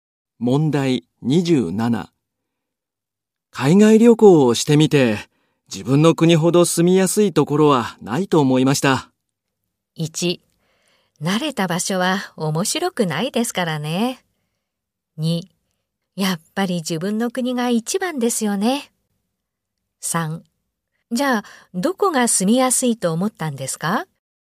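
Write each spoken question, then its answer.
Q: 海外旅行をしてみて、自分の国ほど住みやすいところはないと思いました。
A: 3: やっぱり自分の国が一番ですよね。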